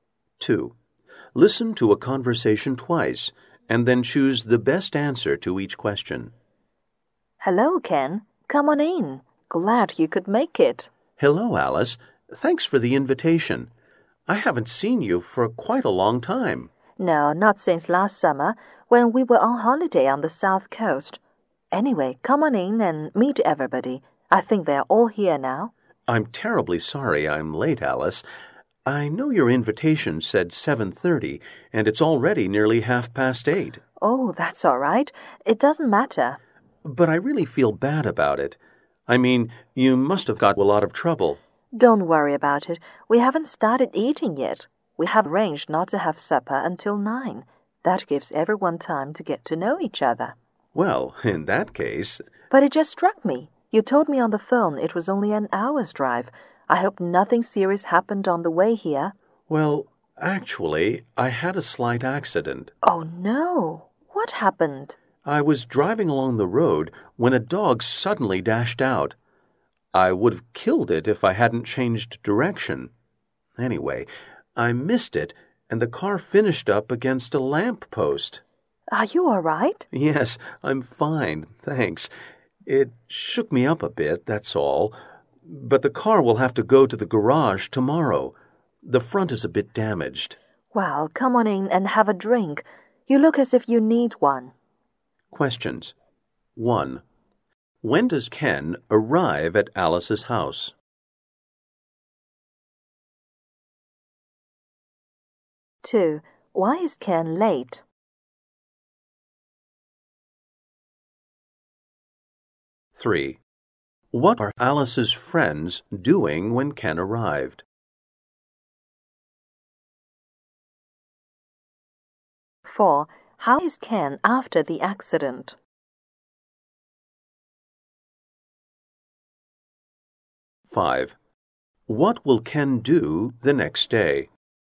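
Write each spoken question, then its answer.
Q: When does Ken arrive at Alice's house?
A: Nearly 8:30

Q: Why is Ken late?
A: He had a slight car accident, swerving to miss a dog and hitting a lamp post

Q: How is Ken after the accident?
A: He's fine, just a bit shaken up

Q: What will Ken do the next day?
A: Take his car to the garage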